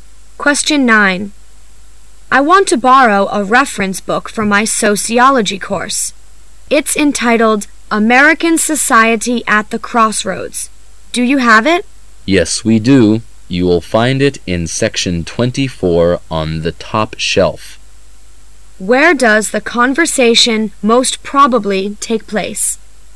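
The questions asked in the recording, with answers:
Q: Where does the conversation most probably take place?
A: In a library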